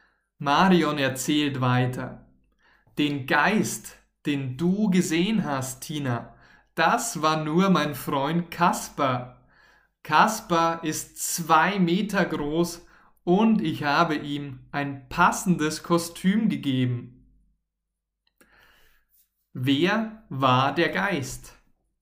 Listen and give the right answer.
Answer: Kasper, Kasper war der Geist.